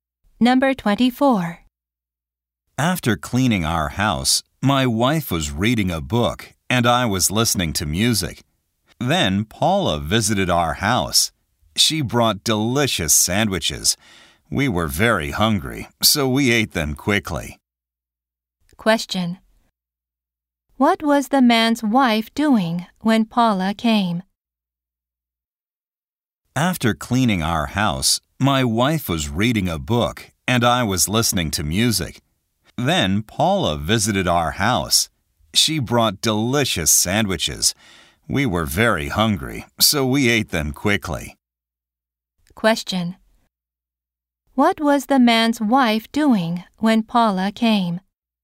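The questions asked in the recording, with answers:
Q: What was the man's wife doing when Paula came?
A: Reading a book.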